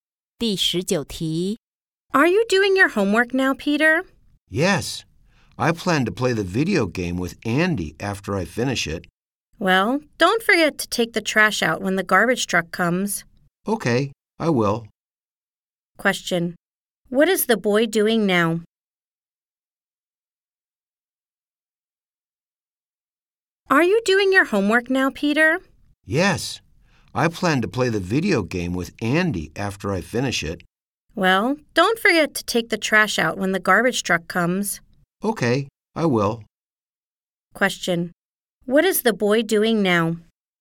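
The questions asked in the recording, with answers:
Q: Question: What is the boy doing now?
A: Doing his homework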